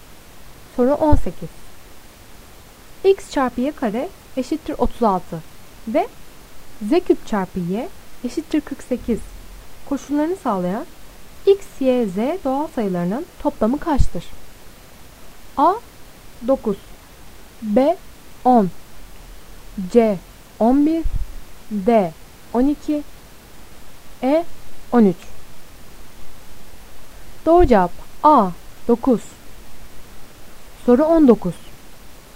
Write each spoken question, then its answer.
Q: X çarpı Y kare eşittir 36 ve Z küp çarpı Y eşittir 48 koşullarını sağlayan X, Y, Z doğal sayılarının toplamı kaçtır?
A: Doğru cevap A. 9.